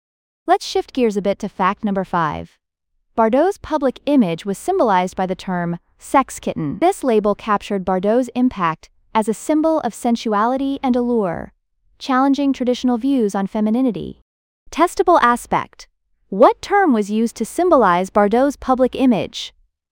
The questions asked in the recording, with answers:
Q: What term was used to symbolize Bardot's public image?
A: Correct answer, sex kitten.